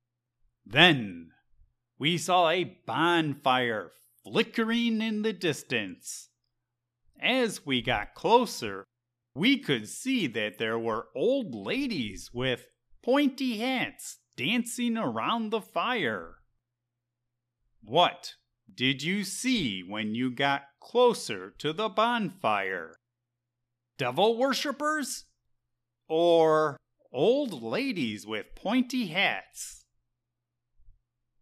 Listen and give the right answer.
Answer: When we got close to the bonfire, we saw a bunch of old ladies with pointy hats dancing around it.